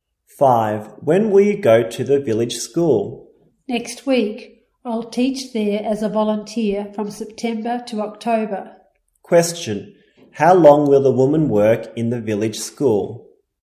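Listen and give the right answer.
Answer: Two months (September to October)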